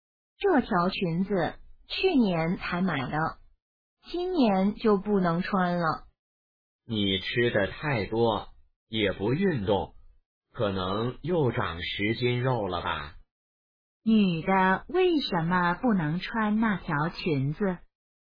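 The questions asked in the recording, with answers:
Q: 女的为什么不能穿那条裙子?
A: 她长胖了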